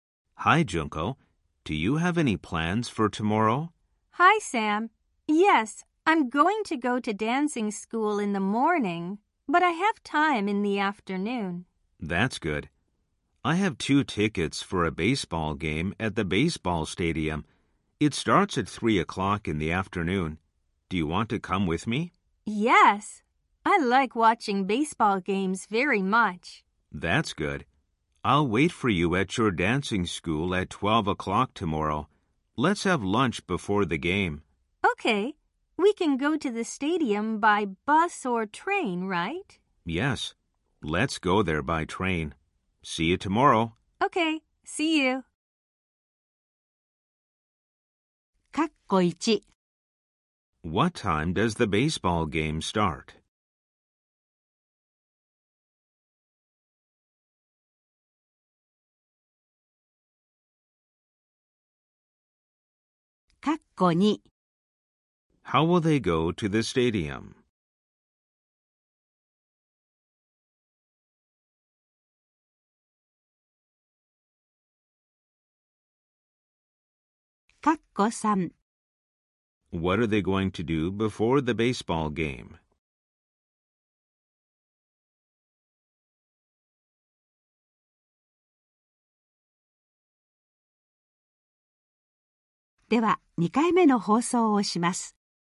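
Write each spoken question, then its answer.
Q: What time does the baseball game start?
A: At 3 o'clock in the afternoon.

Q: How will they go to the stadium?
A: By train.

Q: What are they going to do before the baseball game?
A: Have lunch.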